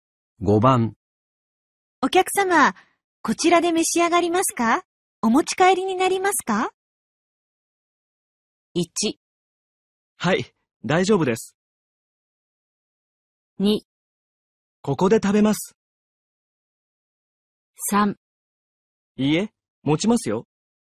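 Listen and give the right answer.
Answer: 2: ここで食べます。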